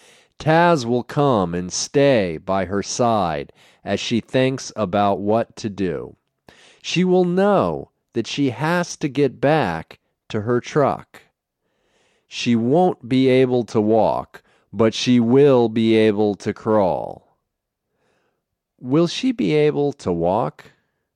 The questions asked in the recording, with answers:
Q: Will she be able to walk?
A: No, she won't be able to walk.